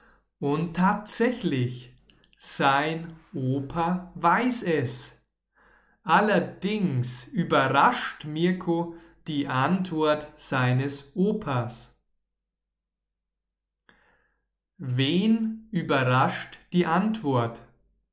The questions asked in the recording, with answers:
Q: Wen überrascht die Antwort?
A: Mirko